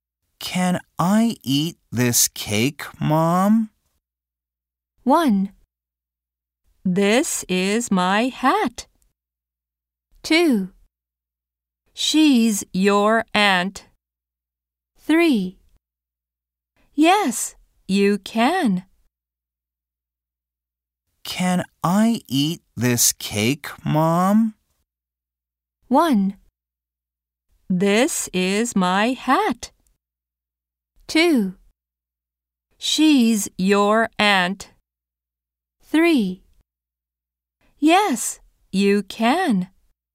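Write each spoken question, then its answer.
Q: Can I eat this cake, Mom?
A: 3: Yes, you can.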